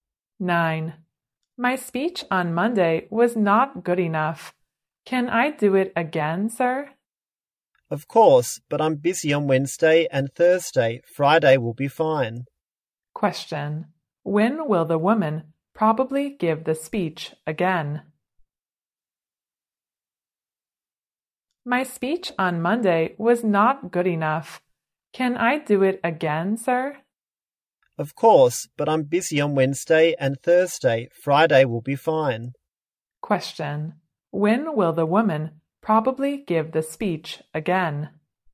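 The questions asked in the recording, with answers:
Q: When will the woman probably give the speech again?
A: On Friday.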